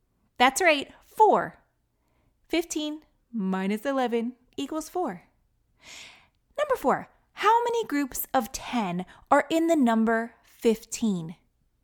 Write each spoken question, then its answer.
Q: How many groups of 10 are in the number 15?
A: There's only 1 group of 10 in the number 15, right?